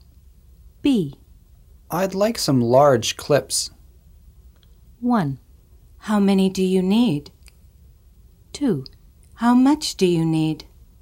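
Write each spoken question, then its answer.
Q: I'd like some large clips.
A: 1: How many do you need?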